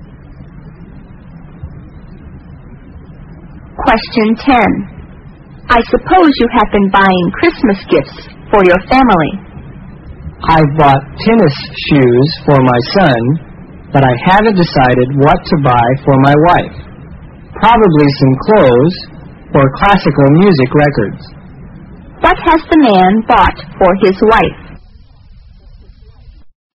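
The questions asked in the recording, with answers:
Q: What has the man bought for his wife?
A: Nothing yet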